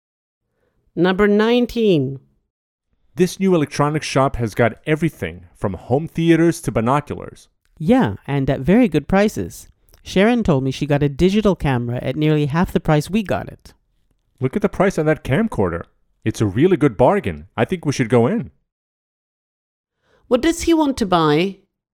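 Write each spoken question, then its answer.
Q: What does he want to buy?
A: A camcorder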